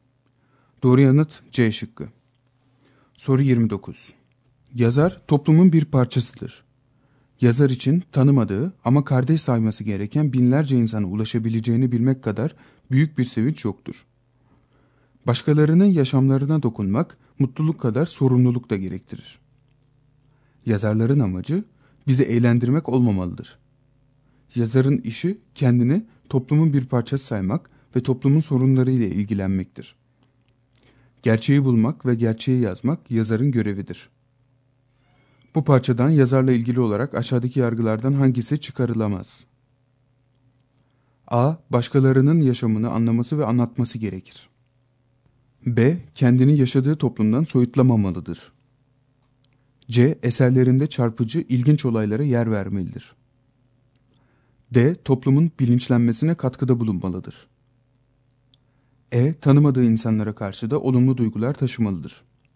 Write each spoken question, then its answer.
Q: Bu parçadan yazarla ilgili olarak aşağıdaki yargılardan hangisi çıkarılamaz?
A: Doğru yanıt C şıkkı.